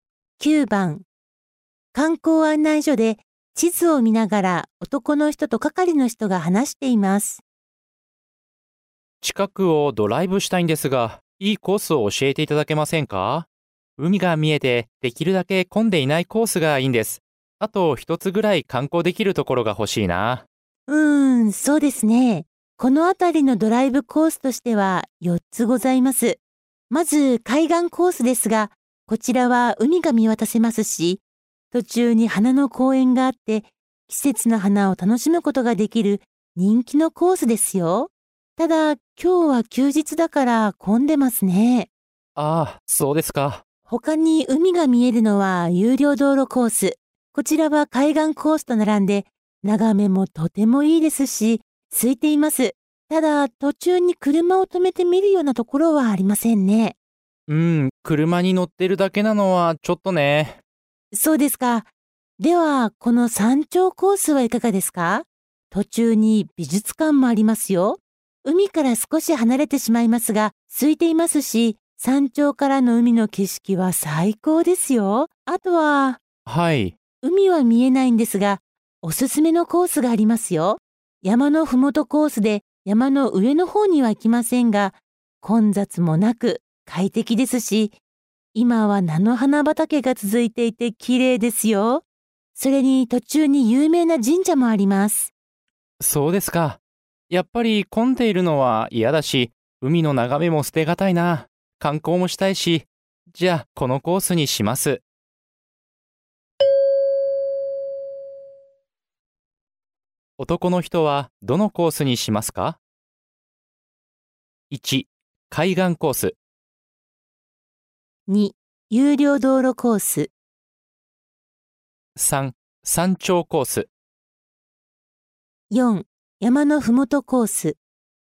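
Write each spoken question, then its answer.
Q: 男の人はどのコースにしますか?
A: 3: 山頂コース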